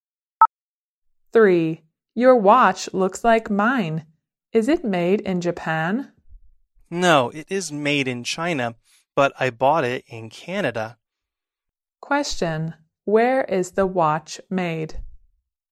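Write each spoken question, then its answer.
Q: Where is the watch made?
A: In China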